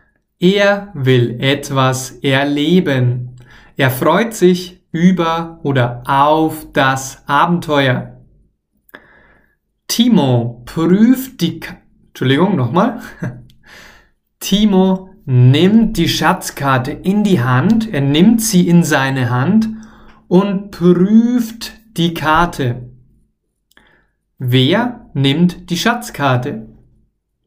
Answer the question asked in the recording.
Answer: Timo, klar. Timo nimmt die Schatzkarte in seine Hand.